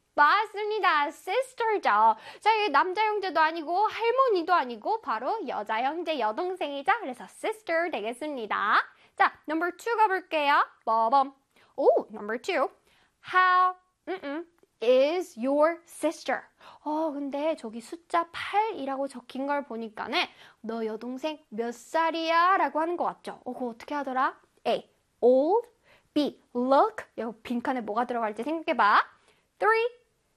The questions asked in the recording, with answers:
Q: How is your sister? 근데 저기 숫자 8이라고 적힌 걸 보니까는 너 여동생 몇 살이야? 라고 하는 것 같죠? 그거 어떻게 하더라? A. Old. B. Look. 요 빈칸에 뭐가 들어갈지 생각해봐.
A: 맞습니다. 정답은 old가 들어가겠죠?